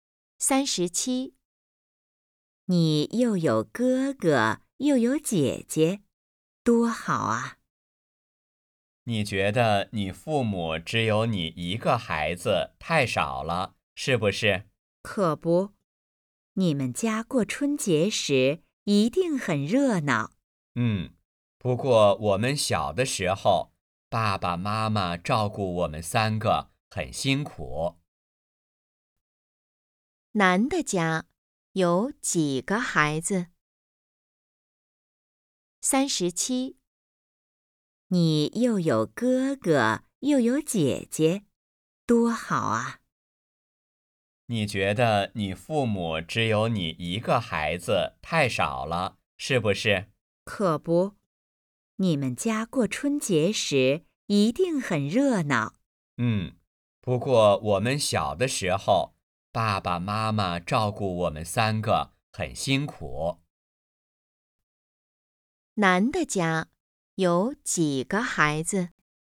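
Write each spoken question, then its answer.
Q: 男的家有几个孩子?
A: 三个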